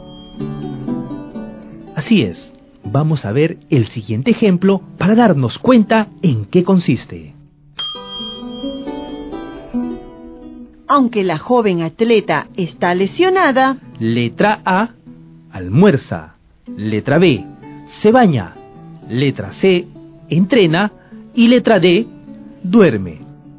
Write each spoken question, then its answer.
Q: Aunque la joven atleta está lesionada,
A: Aunque la joven atleta está lesionada, entrena.